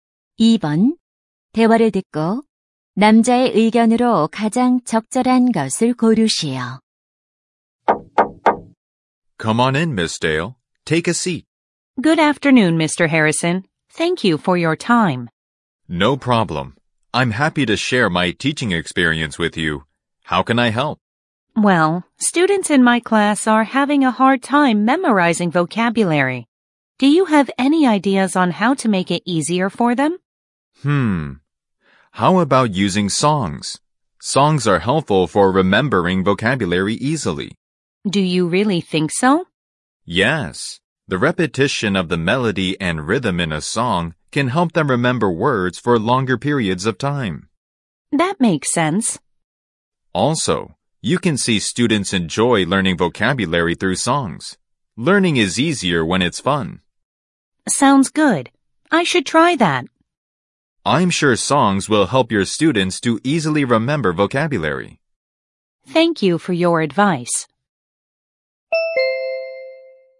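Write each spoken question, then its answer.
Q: 대화를 듣고 남자의 의견으로 가장 적절한 것을 고르시오.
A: 노래는 어휘를 쉽게 암기하는 데 도움이 된다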